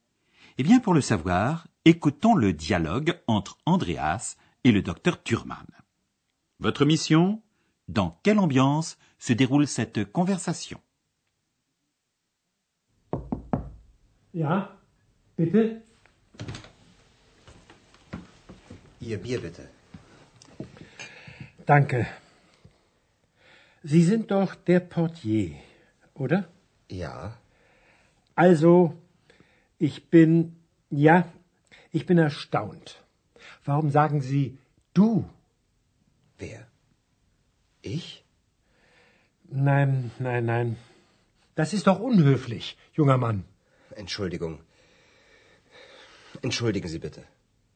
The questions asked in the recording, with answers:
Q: Votre mission Dans quelle ambiance se déroule cette conversation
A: Alors, cette ambiance. Hmm, assez neutre, voire assez peu amicale, non?